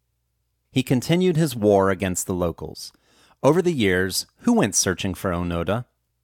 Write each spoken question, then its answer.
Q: Over the years, who went searching for Onoda?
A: Over the years, various groups of Japanese went searching for Onoda.